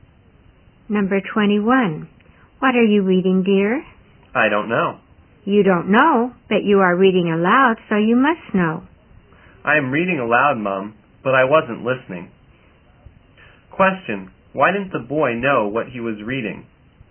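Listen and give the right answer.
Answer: He wasn't listening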